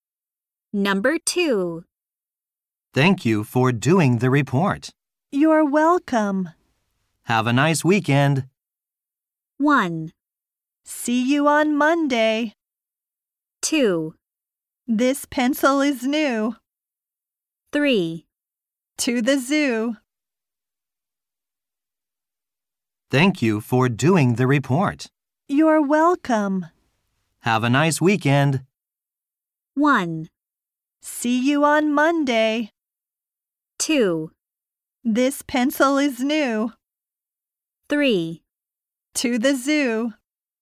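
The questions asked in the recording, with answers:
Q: Have a nice weekend.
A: 1: See you on Monday.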